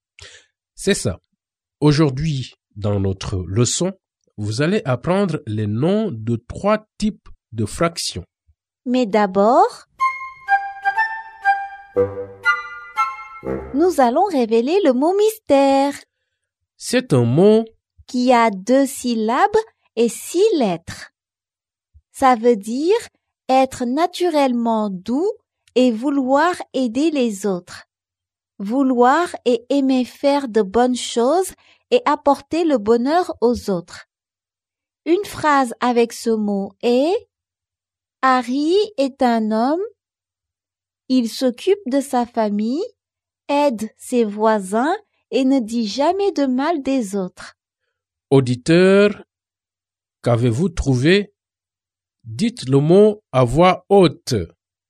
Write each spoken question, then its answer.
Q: Auditeur, qu'avez-vous trouvé?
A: Le mot mystère est « gentil ».